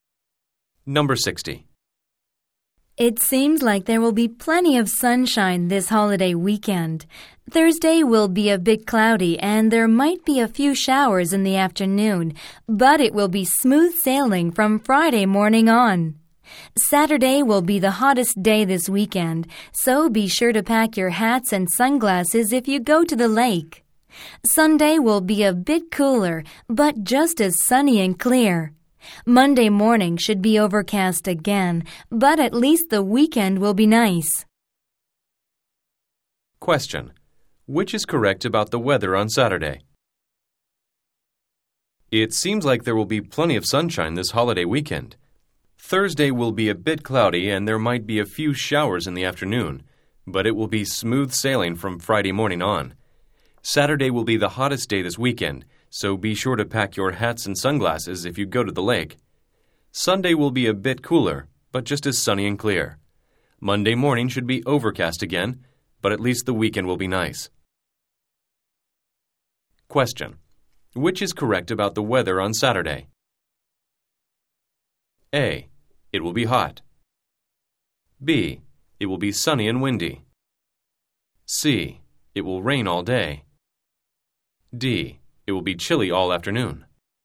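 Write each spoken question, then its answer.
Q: Which is correct about the weather on Saturday?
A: A: It will be hot.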